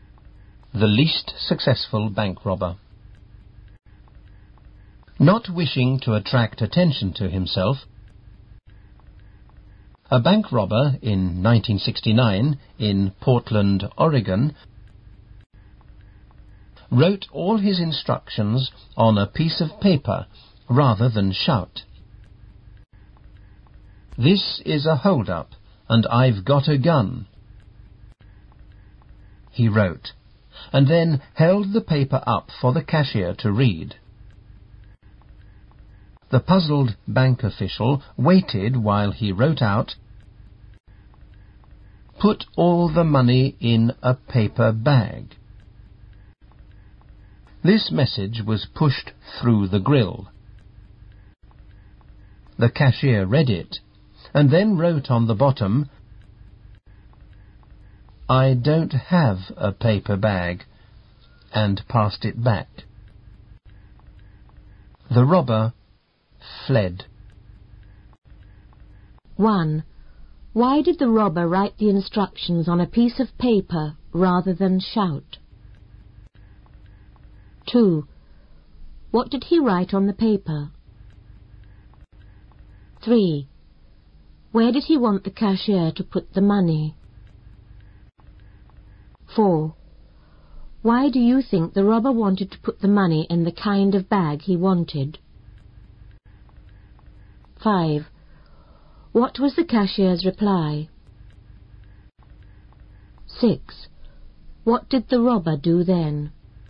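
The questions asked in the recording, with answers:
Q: Why did the robber write the instructions on a piece of paper rather than shout?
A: He didn't wish to attract attention to himself

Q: What did he write on the paper?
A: This is a hold-up, and I've got a gun

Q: Where did he want the cashier to put the money?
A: In a paper bag

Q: What was the cashier's reply?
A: I don't have a paper bag

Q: What did the robber do then?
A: He fled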